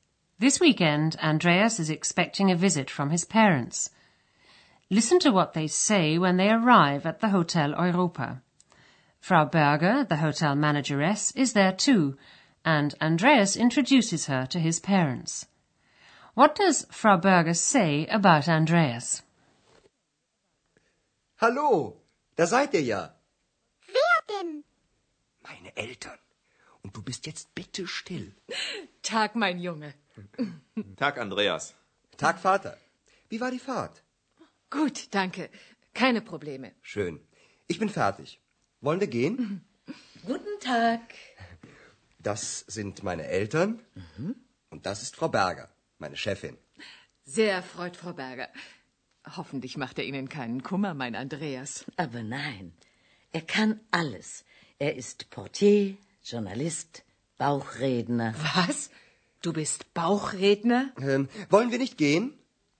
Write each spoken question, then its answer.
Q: What does Frau Berger say about Andreas?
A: She says he's a porter, a journalist, and a ventriloquist.